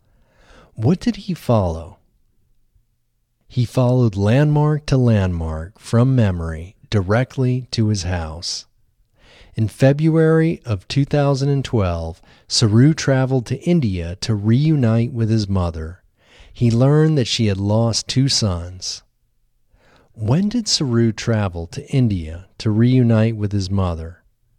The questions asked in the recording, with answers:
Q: When did Saru travel to India to reunite with his mother?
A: Saru traveled to India in February of 2012 to reunite with his mother.